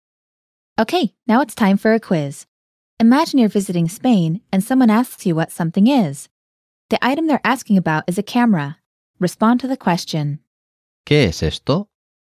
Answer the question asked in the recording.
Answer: Es una cámara.